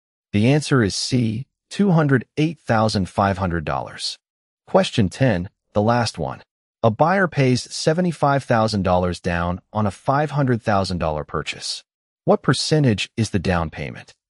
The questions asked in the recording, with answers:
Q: What percentage is the down payment?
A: The answer is C, 15%.